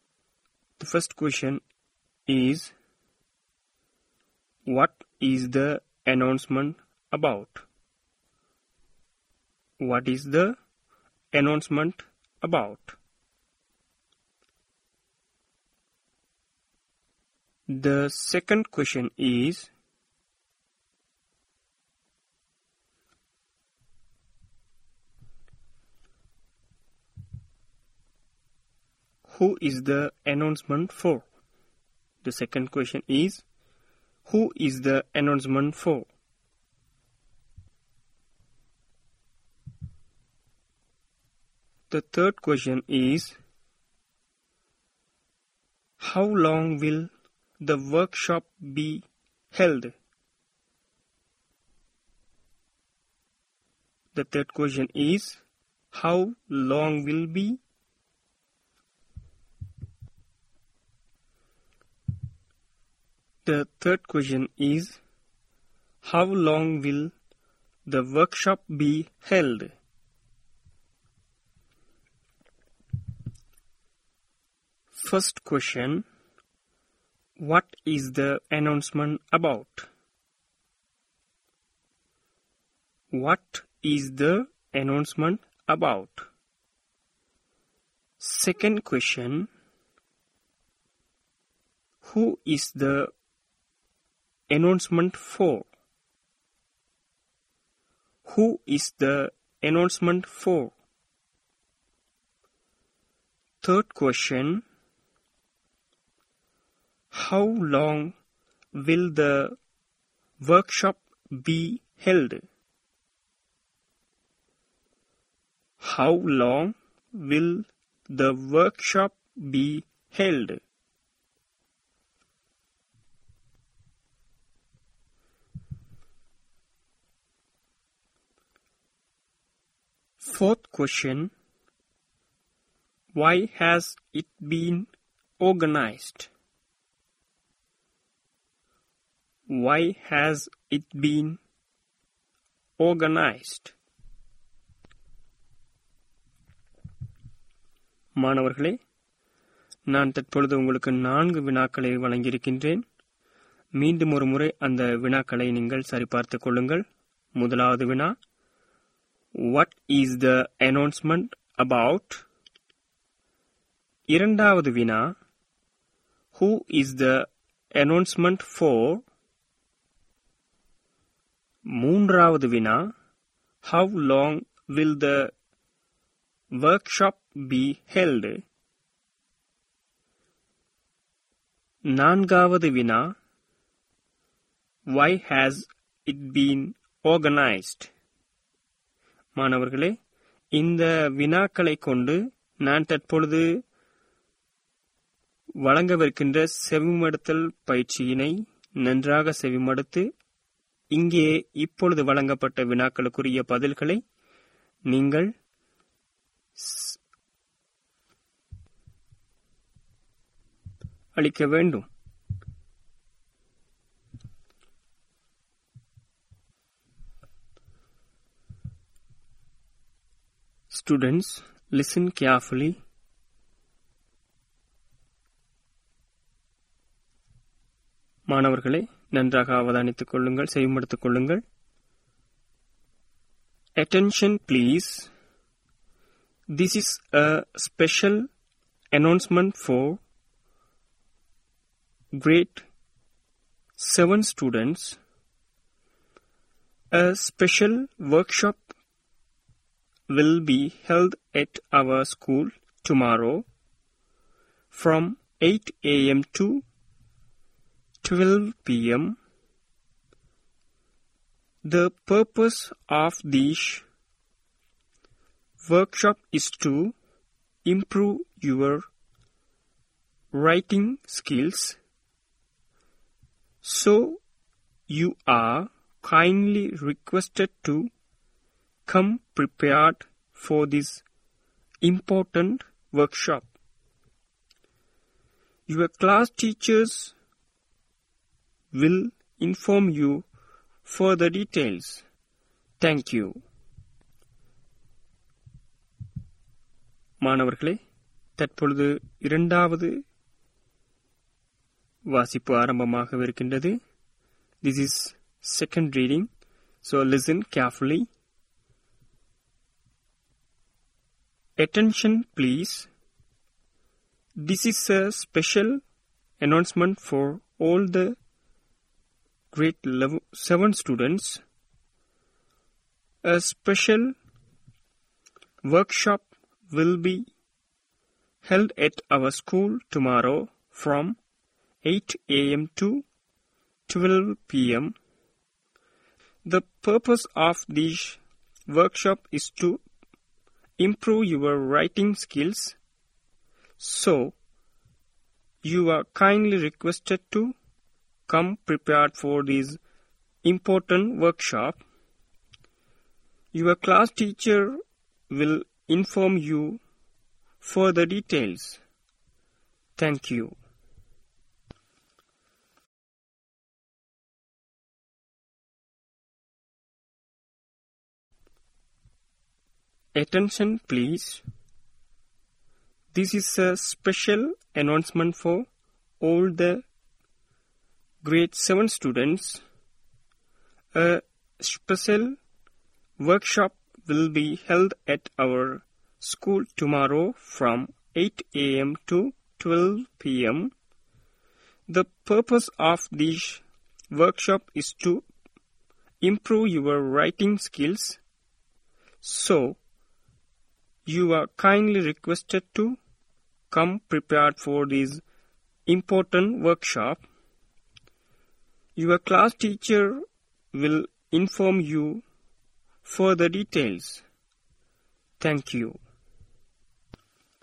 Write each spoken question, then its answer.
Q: What is the announcement about?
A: It was about a workshop

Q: who is the announcement for?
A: The announcement for all the grade 7 students

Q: how long will the workshop be held?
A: 8 AM to 12 PM என்ற கால அளவானது 4 மணித்தியாலங்கள்.

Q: Why has it been organized?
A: To improve writing skills or to improve grade 7 students writing skills